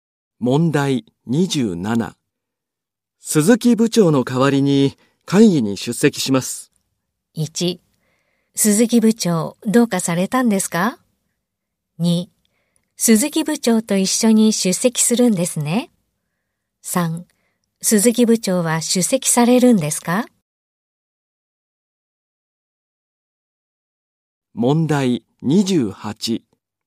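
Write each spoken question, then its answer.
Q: 鈴木部長の代わりに会議に出席します。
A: 2: 鈴木部長どうかされたんですか?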